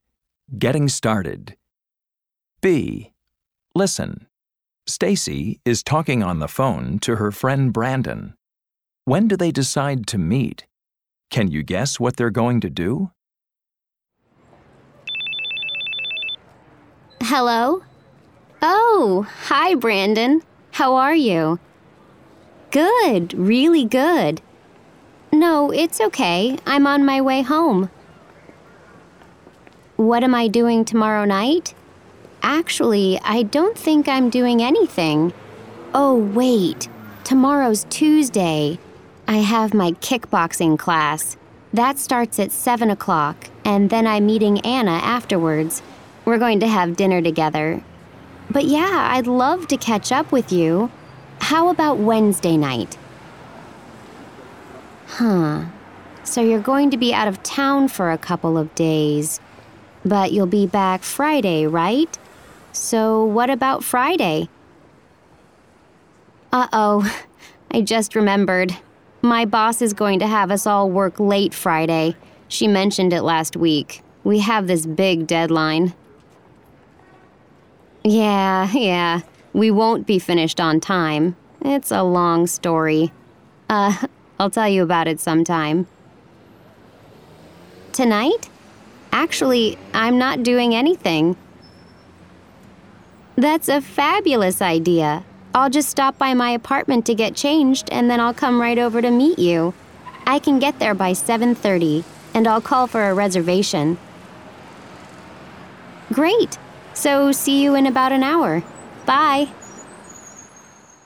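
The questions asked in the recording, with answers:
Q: When do they decide to meet?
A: Tonight, at about 7:30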